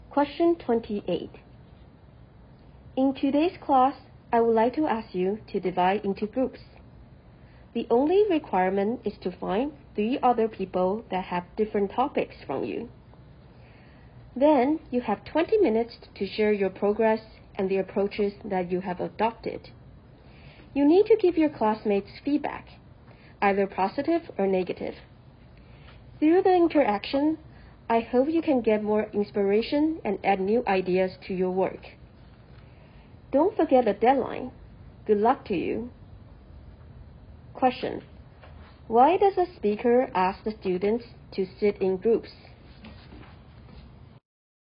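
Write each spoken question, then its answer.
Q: Why does a speaker ask the students to sit in groups?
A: To share their progress and give each other feedback so they get inspiration and new ideas for their work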